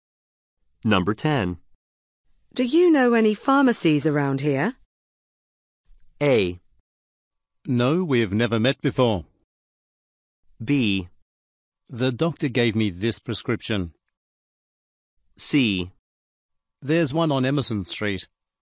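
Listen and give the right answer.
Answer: C: There's one on Emerson Street.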